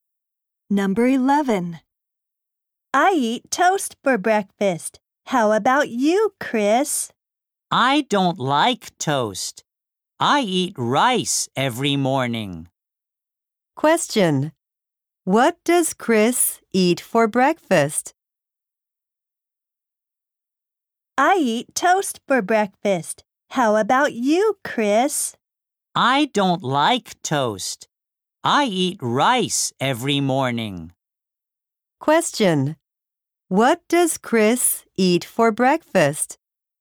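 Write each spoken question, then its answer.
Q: What does Chris eat for breakfast?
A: Rice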